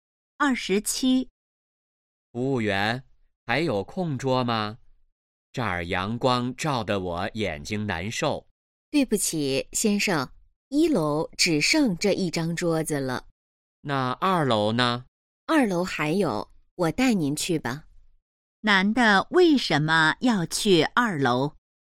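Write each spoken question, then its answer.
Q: 男的为什么要去2楼?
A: 1楼阳光照得眼睛难受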